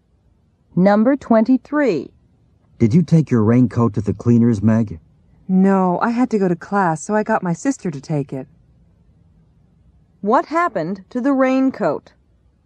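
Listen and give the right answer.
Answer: Meg's sister took it to the cleaners.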